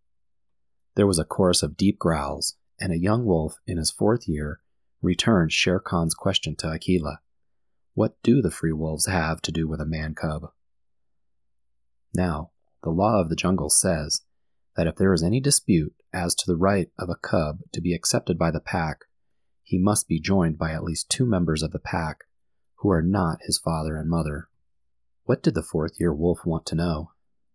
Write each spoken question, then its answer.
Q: What did the fourth-year wolf want to know?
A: The fourth-year wolf wanted to know why the wolf pack would want to accept a man-cub as one of their own.